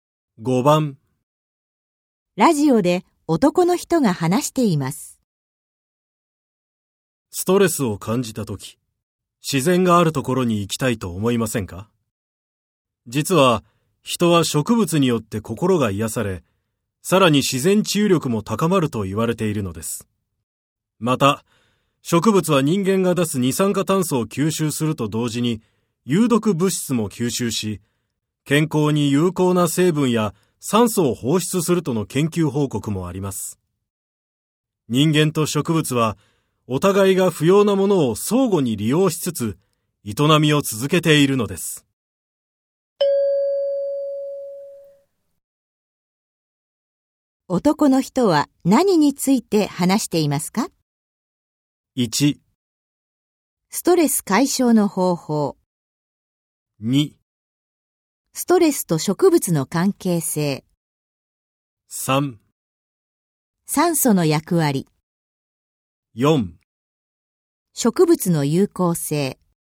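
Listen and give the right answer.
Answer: 4: 植物の有効性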